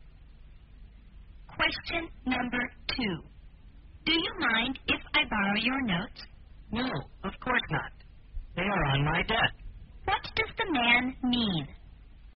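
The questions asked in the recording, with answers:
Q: What does the man mean?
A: He is happy to lend his notes; they are on his desk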